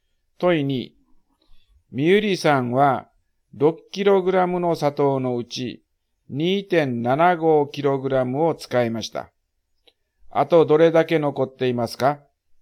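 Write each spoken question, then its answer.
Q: あとどれだけ残っていますか?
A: 3.25kg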